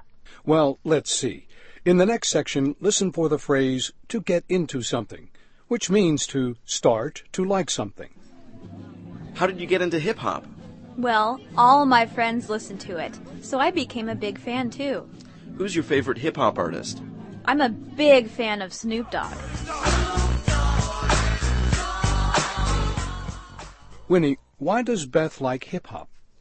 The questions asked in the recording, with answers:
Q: Winnie, why does Beth like hip-hop?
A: 她说她喜欢上嘻哈乐啊,是因为她的朋友都爱听这种音乐